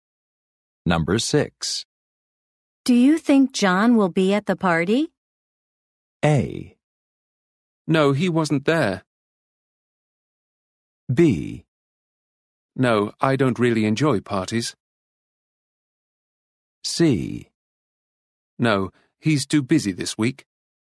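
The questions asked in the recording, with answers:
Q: Do you think John will be at the party?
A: C: No, he's too busy this week.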